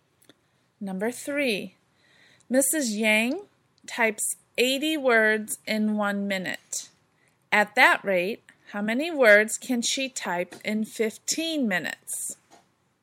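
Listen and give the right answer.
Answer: 1,200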